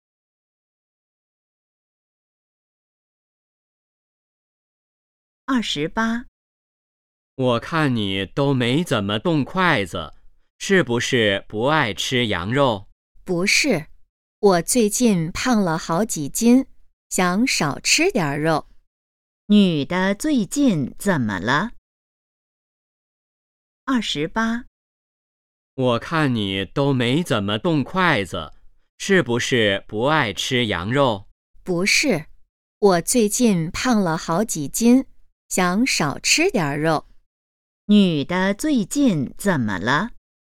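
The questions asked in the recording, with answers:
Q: 女的最近怎么了?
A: 胖了好几斤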